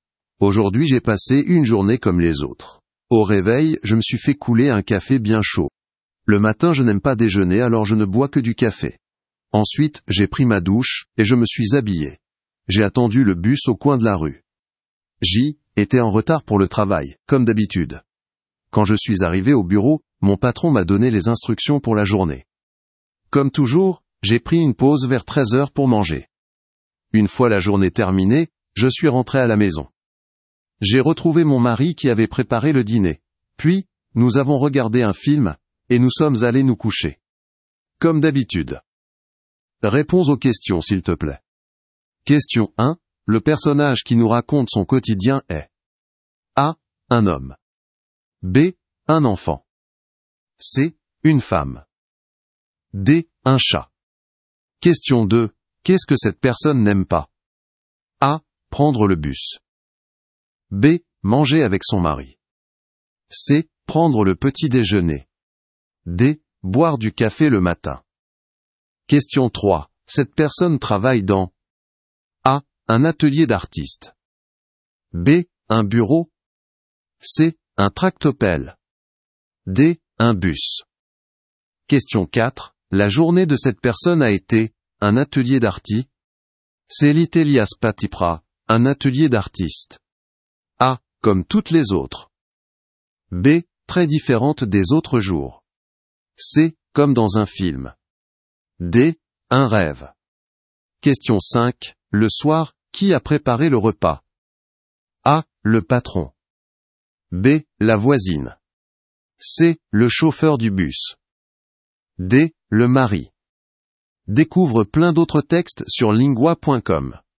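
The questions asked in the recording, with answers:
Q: Qu'est-ce que cette personne n'aime pas?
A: C: prendre le petit déjeuner

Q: Cette personne travaille dans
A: B: un bureau

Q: La journée de cette personne a été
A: A: comme toutes les autres

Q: Le soir, qui a préparé le repas?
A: D: le mari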